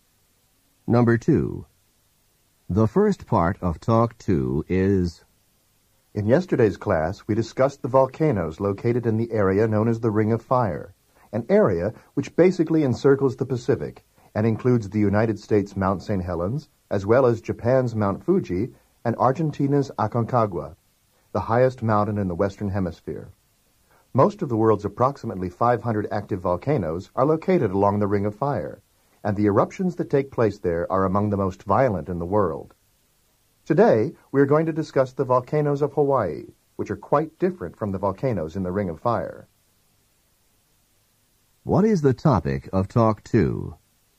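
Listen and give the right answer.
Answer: The volcanoes of Hawaii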